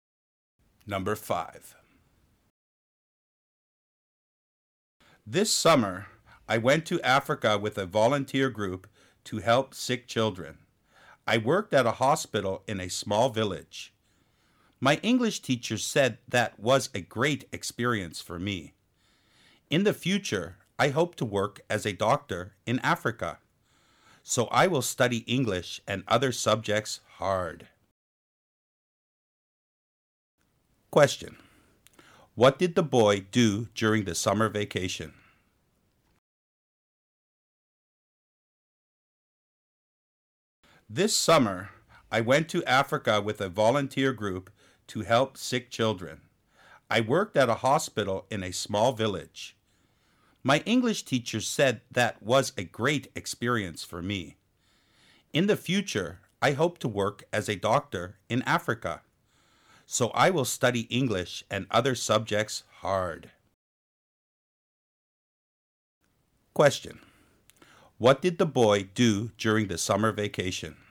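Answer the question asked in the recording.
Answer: He went to Africa with a volunteer group and worked at a hospital to help sick children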